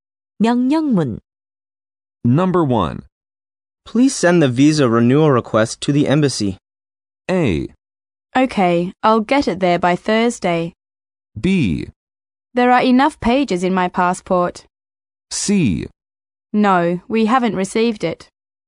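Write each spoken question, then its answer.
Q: Please send the visa renewal request to the embassy.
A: A: Okay, I'll get it there by Thursday.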